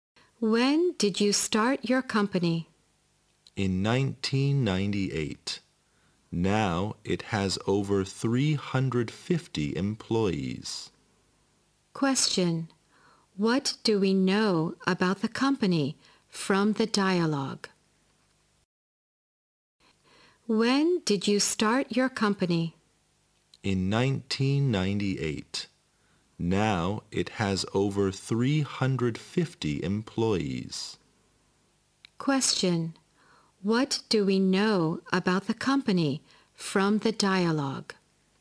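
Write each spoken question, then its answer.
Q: What do we know about the company from the dialogue?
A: It was started in 1998 and now has over 350 employees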